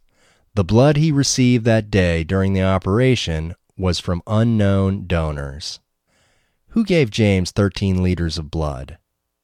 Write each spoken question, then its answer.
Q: Who gave James 13 liters of blood?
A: The blood was from unnamed donors.